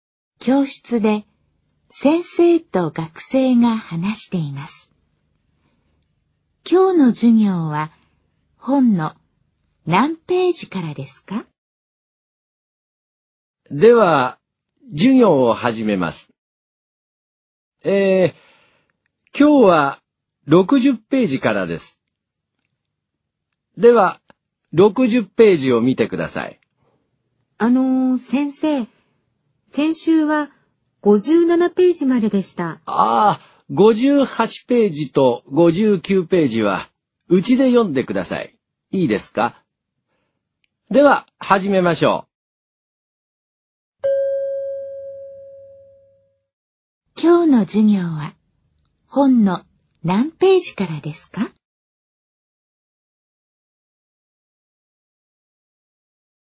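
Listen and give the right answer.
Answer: 60ページから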